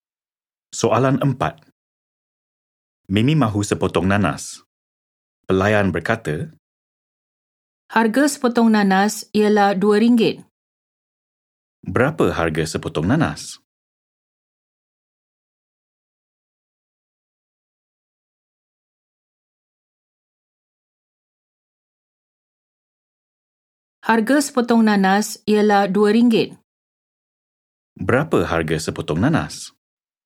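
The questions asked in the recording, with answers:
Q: Berapa harga sepotong nanas?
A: RM2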